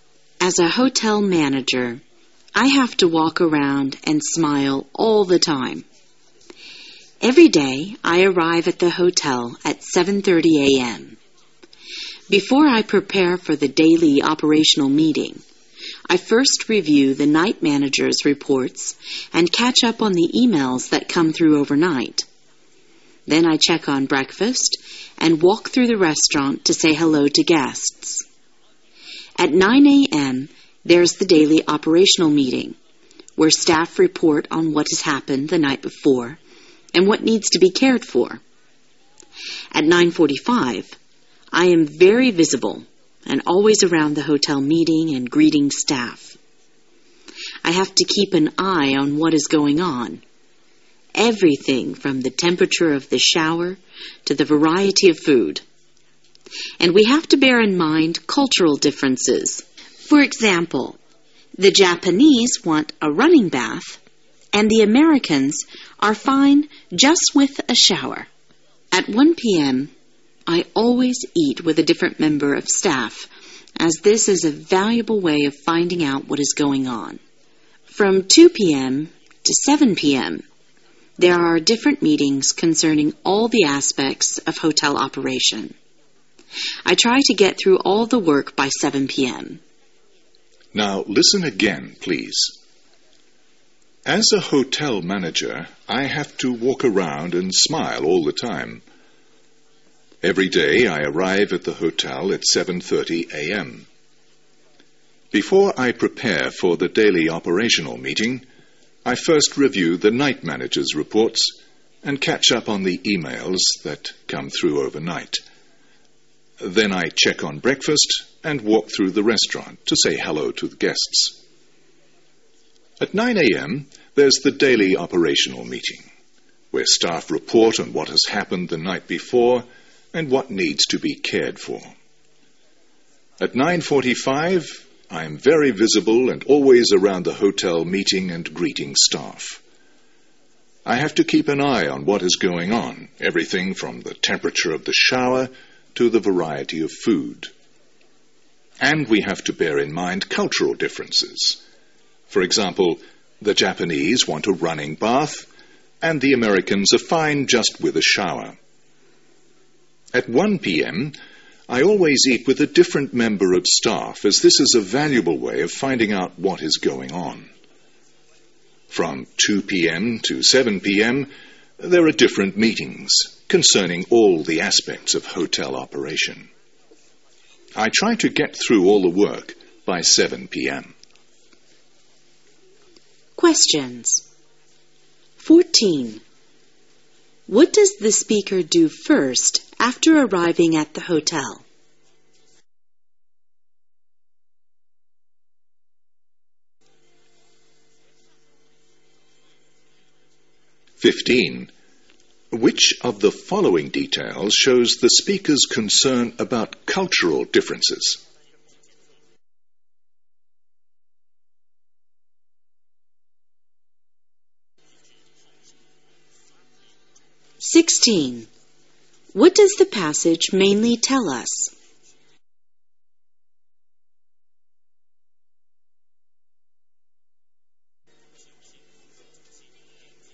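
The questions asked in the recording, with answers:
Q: What does the speaker do first after arriving at the hotel?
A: Reviews the night manager's reports

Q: Which of the following details shows the speaker's concern about cultural differences?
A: The Japanese want a running bath, while Americans are fine with a shower

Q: What does the passage mainly tell us?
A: A hotel manager's daily routine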